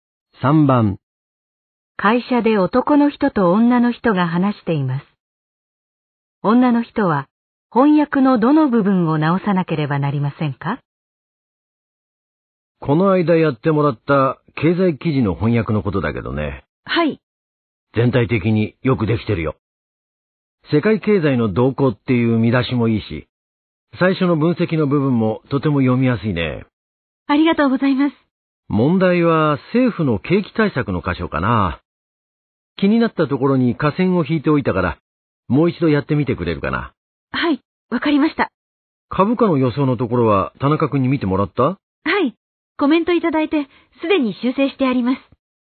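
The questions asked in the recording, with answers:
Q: 女の人は翻訳のどの部分を直さなければなりませんか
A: 政府の景気対策の部分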